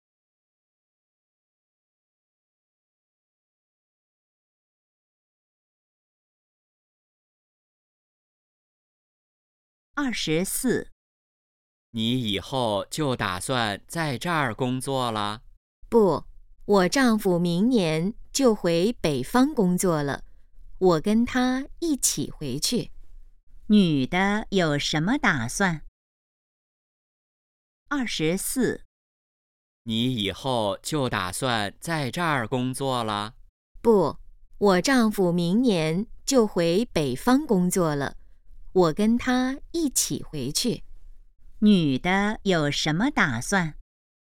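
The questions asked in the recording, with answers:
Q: 女的有什么打算?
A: 跟丈夫回北方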